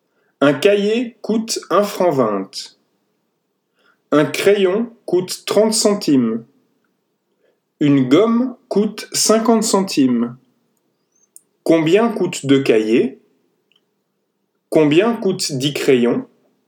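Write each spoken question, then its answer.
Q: Combien coûte 2 cahiers?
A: 2,40 francs

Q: Combien coûte 10 crayons?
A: 3 francs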